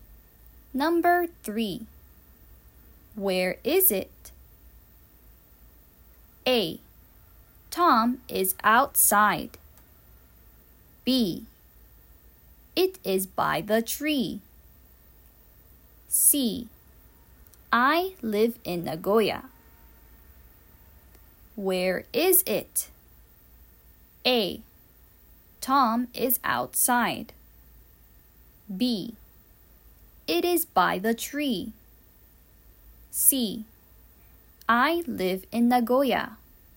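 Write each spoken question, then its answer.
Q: Where is it?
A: B: It is by the tree.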